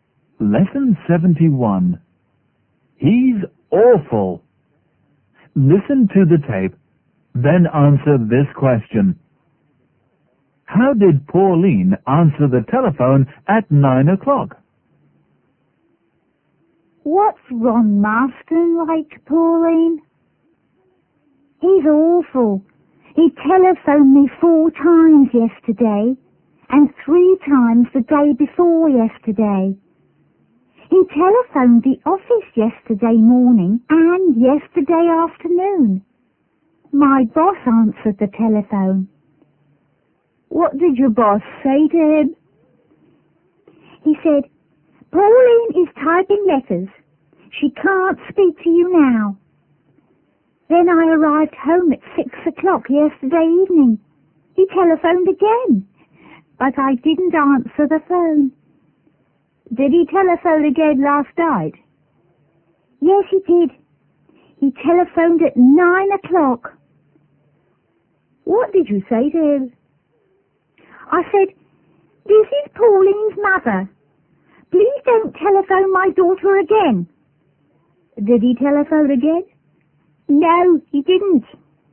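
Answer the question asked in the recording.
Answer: She pretended to be her mother: "This is Pauline's mother. Please don't telephone my daughter again."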